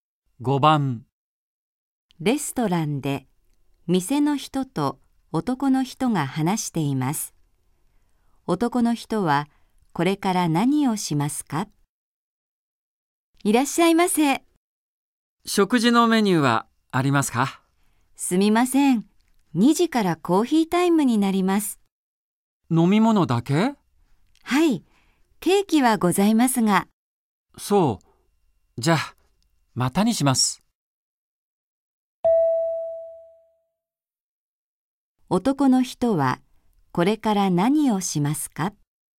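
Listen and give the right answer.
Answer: 何も食べずに店を出る(またにする)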